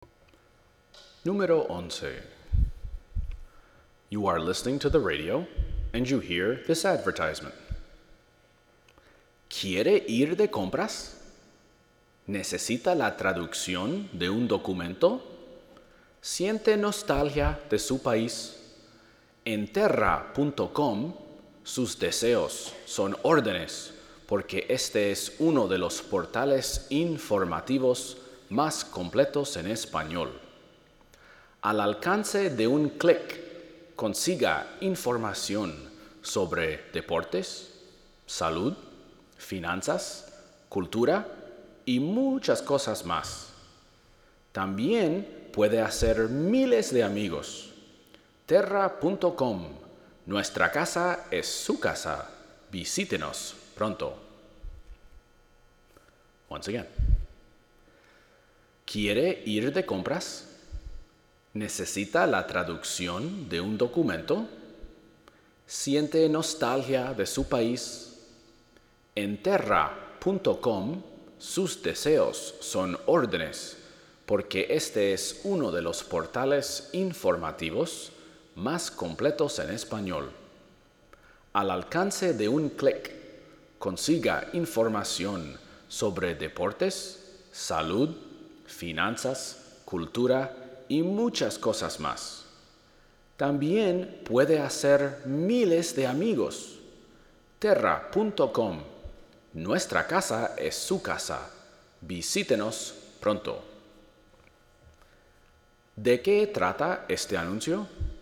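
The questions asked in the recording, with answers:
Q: ¿De qué trata este anuncio?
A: De un portal informativo en internet (Terra.com)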